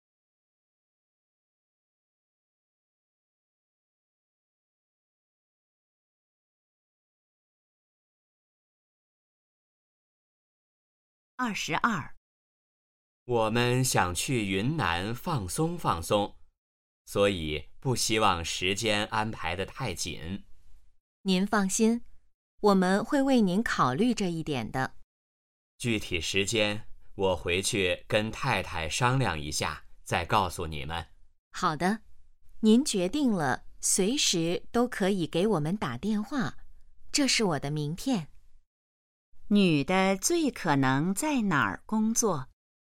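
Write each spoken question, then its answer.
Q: 女的最可能在哪儿工作?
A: 旅行社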